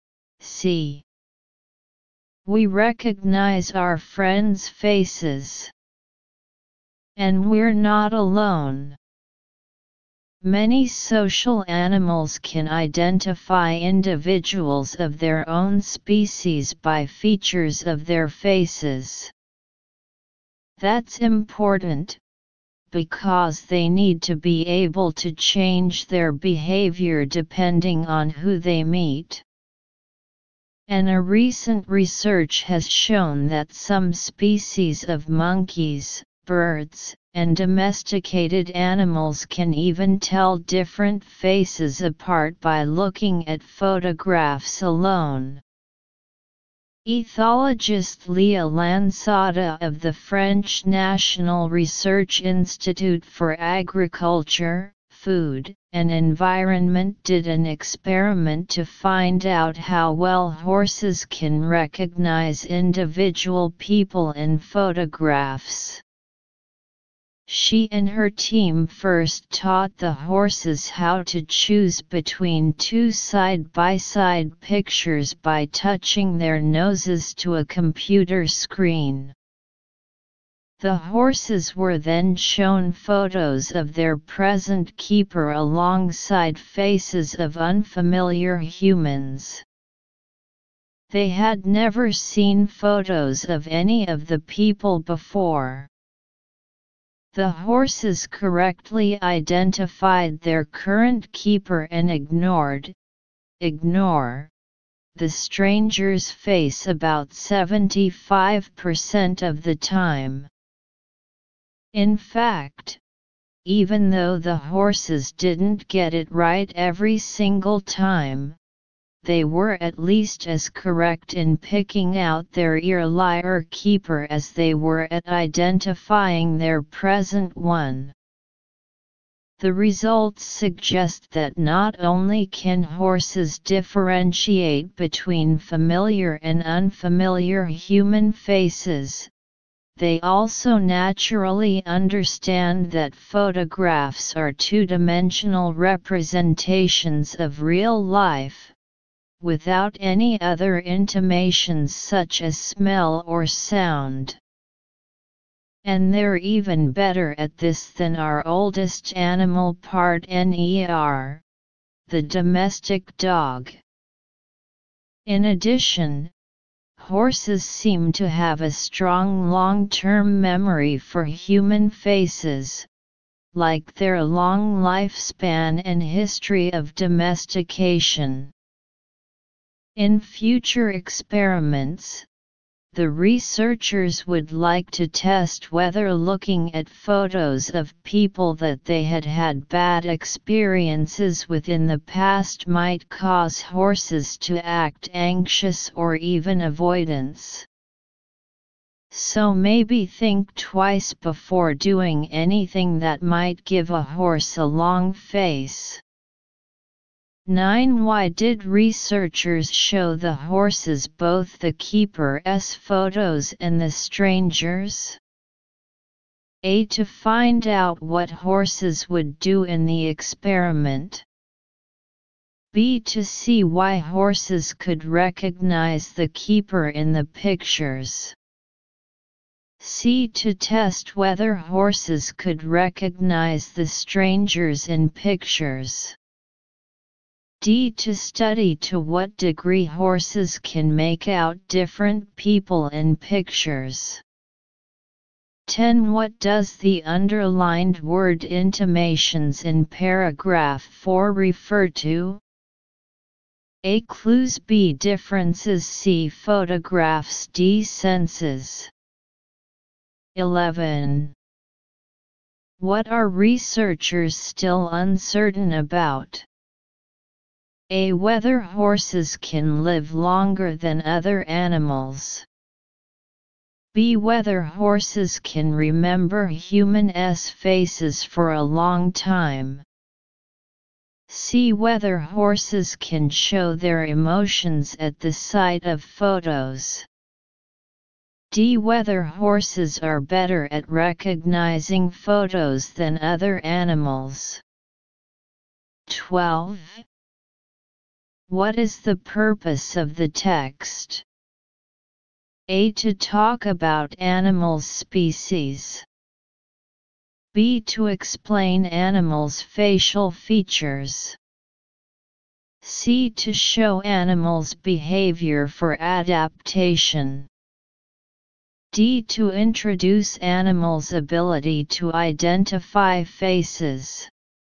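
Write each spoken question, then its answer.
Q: Why did researchers show the horses both the keeper's photos and the stranger's?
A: D: To study to what degree horses can make out different people in pictures.

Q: What does the underlined word intimations in paragraph 4 refer to?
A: A: Clues.

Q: What are researchers still uncertain about?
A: C: Whether horses can show their emotions at the sight of photos.

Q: What is the purpose of the text?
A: D: To introduce animals' ability to identify faces.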